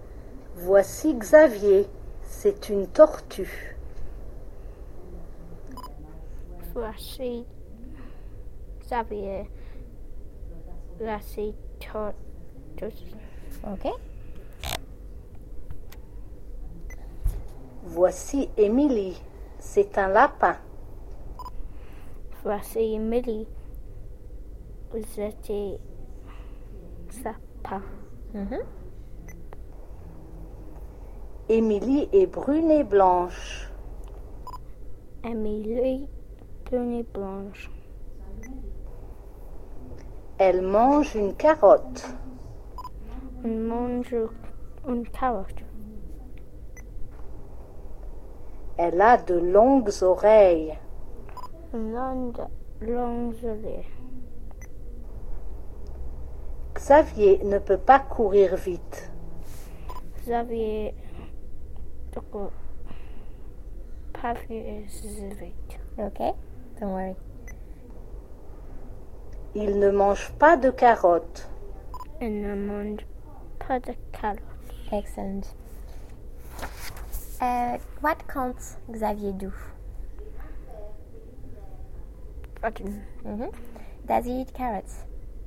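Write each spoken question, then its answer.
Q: What can't Xavier do?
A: Run fast

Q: Does he eat carrots?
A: No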